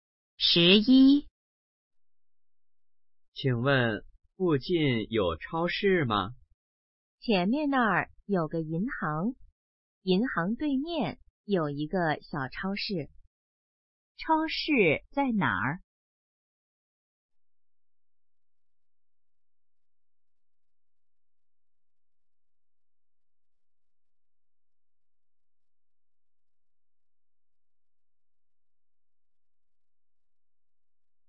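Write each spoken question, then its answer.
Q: 超市在哪儿?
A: 银行对面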